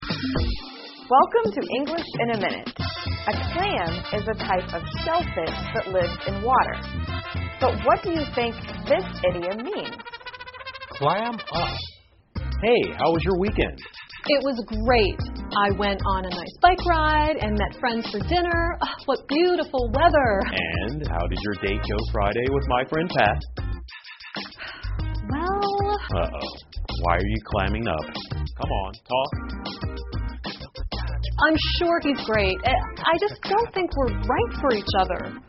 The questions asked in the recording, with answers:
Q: But what do you think this idiom means?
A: To clam up means to say nothing or stop talking.